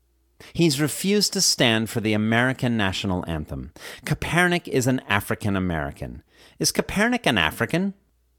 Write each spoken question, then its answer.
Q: Is Kaepernick an African?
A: No, Kaepernick is not an African.